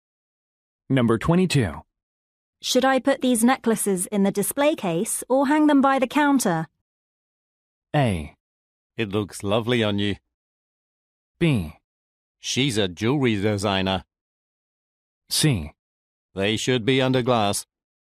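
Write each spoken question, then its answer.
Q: Should I put these necklaces in the display case or hang them by the counter?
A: C: They should be under glass.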